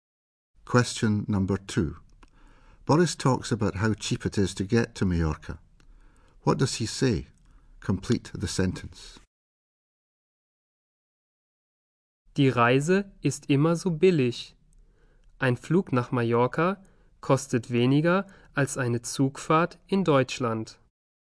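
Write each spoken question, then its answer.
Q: What does he say? Complete the sentence.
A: A flight to Mallorca costs less than a train journey in Germany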